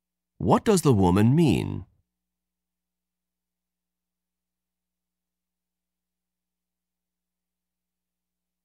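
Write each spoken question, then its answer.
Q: What does the woman mean?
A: The lecture was boring; she almost fell asleep.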